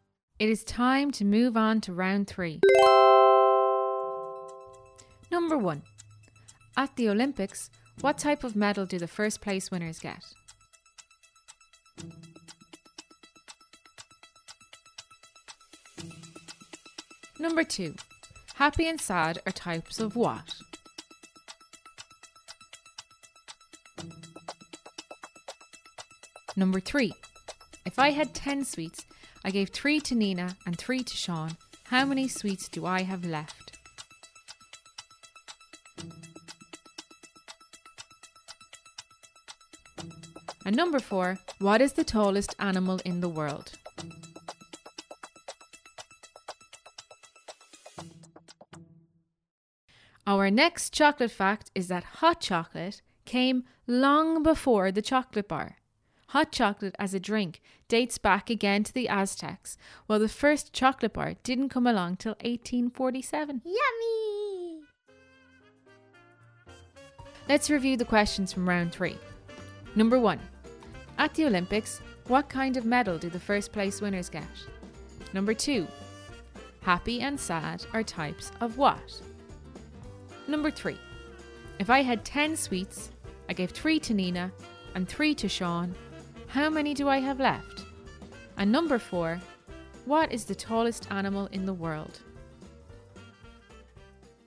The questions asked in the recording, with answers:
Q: If I had 10 sweets, I gave 3 to Nina and 3 to Sean. How many sweets do I have left?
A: 10 sweets minus 6 sweets means you have 4 sweets left.